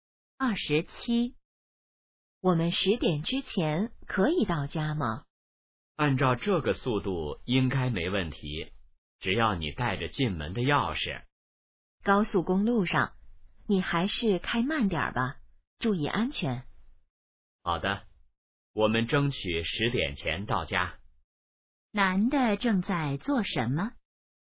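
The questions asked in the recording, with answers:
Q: 男的正在做什么?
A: 开车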